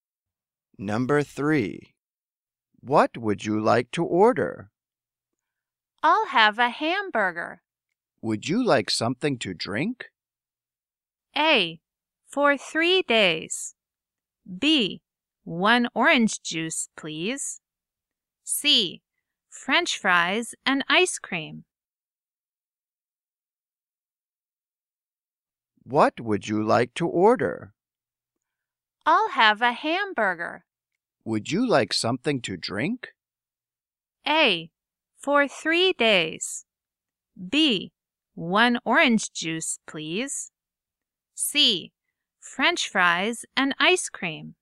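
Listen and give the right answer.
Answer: B: 1 orange juice, please.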